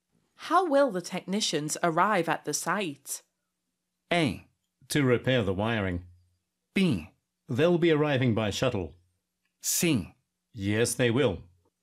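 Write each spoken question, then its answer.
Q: How will the technicians arrive at the site?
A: B: They'll be arriving by shuttle.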